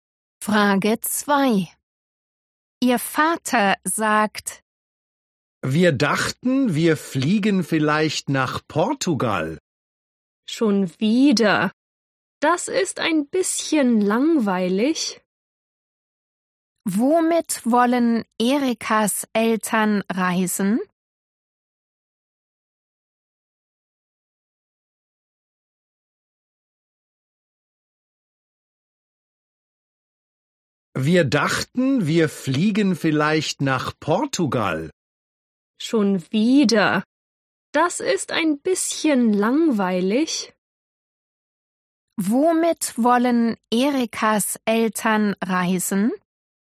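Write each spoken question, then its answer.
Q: Womit wollen Erikas Eltern reisen?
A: mit dem Flugzeug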